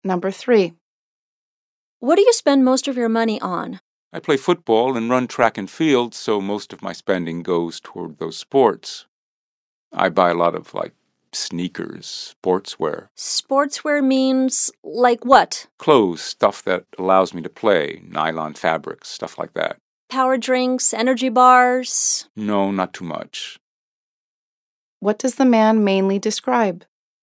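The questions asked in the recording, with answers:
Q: What does the man mainly describe?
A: What he spends his money on: sports gear like sneakers and sportswear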